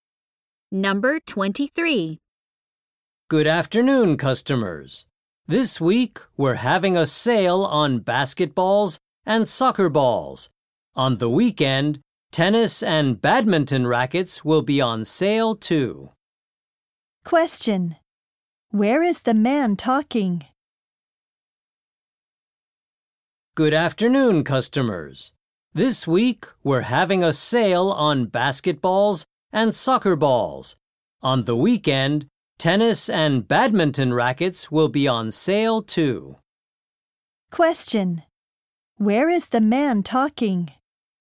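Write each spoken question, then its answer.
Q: Where is the man talking?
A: At a sports store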